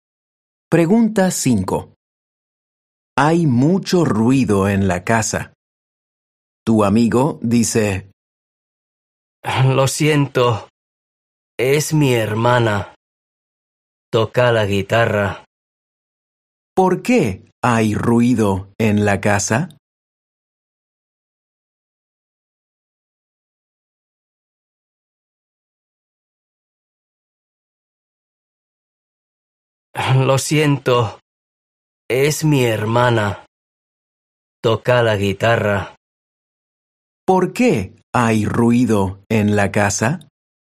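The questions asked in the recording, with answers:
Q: ¿Por qué hay ruido en la casa?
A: Su hermana toca la guitarra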